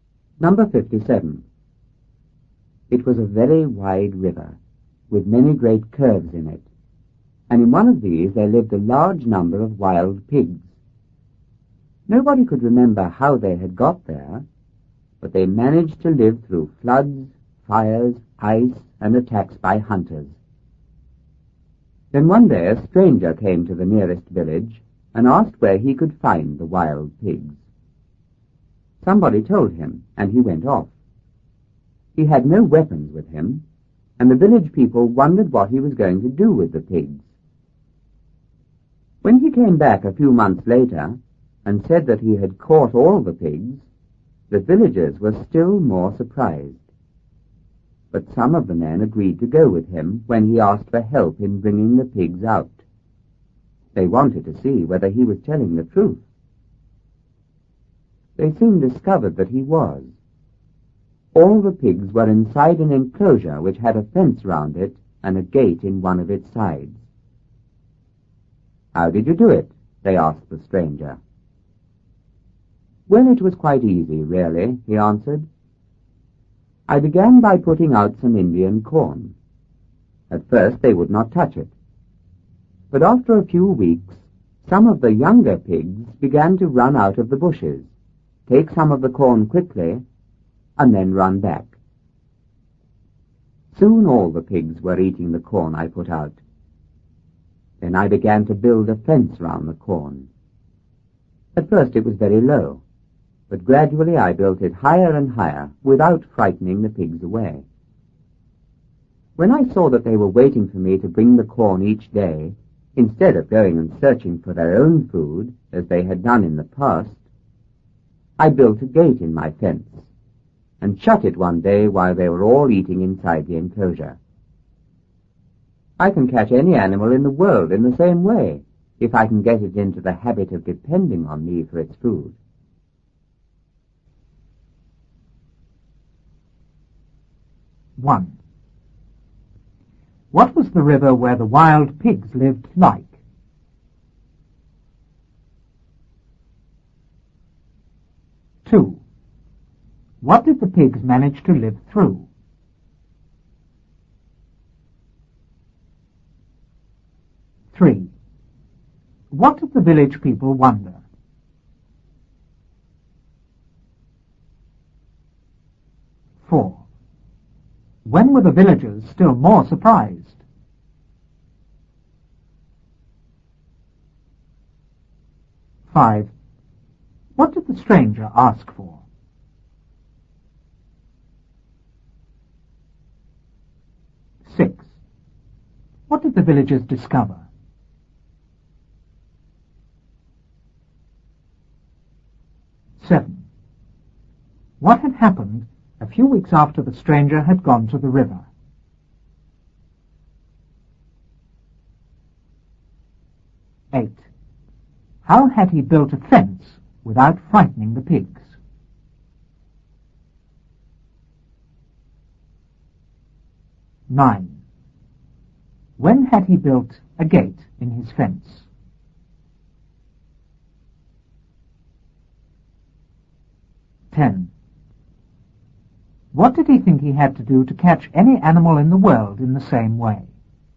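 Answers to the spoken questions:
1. Very wide, with many great curves in it
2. Floods, fires, ice, and attacks by hunters
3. What the stranger was going to do with the pigs
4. When he came back a few months later and said he had caught all the pigs
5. Help in bringing the pigs out
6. That he was telling the truth; all the pigs were inside a fenced enclosure
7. Some younger pigs began to run out of the bushes, take some corn quickly and run back
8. He built it very low at first and gradually made it higher
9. When he saw the pigs were waiting for him to bring corn each day instead of searching for their own food
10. Get it into the habit of depending on him for its food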